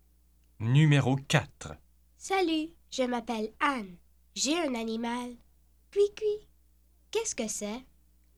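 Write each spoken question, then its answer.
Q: Qu'est-ce que c'est?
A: un oiseau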